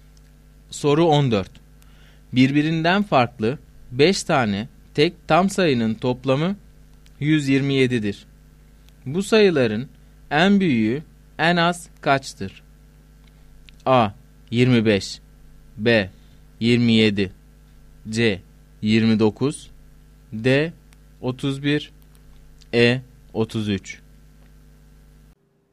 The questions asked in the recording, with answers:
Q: Bu sayıların en büyüğü en az kaçtır?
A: Doğru cevap D şıkkı.